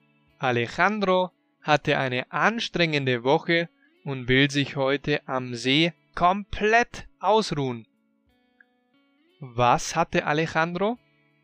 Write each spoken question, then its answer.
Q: Was hatte Alejandro?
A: Er hatte eine anstrengende Woche.